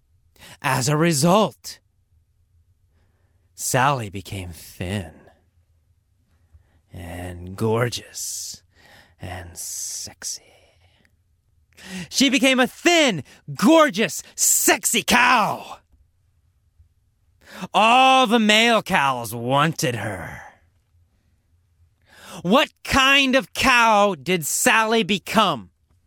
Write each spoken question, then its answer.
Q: What kind of cow did Sally become?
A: She became a thin, gorgeous, sexy cow.